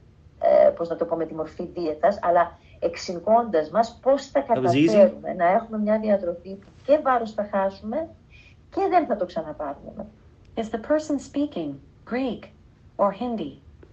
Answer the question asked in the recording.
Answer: Greek.